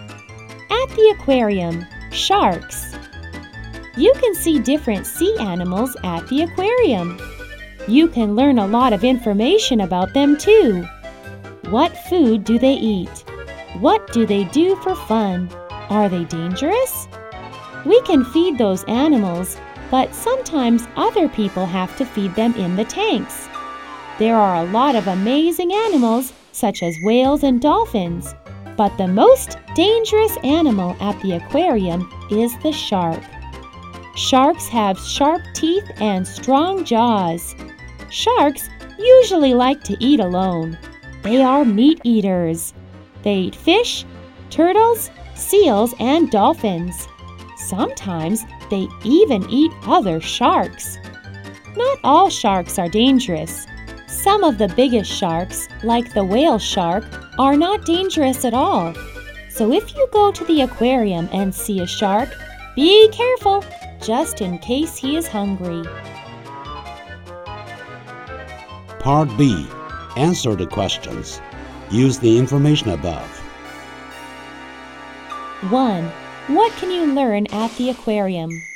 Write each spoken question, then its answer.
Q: What can you learn at the aquarium?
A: We can learn a lot of information about sea animals at the aquarium.